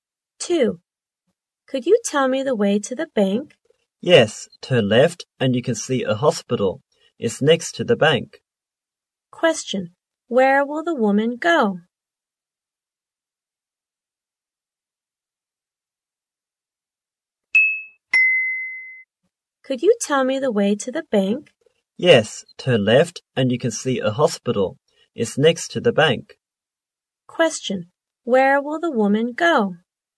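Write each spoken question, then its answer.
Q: Question, where will the woman go?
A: To the bank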